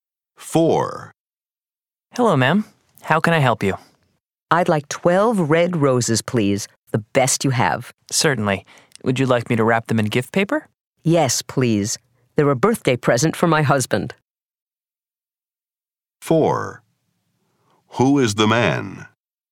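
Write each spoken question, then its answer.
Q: Who is the man?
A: A florist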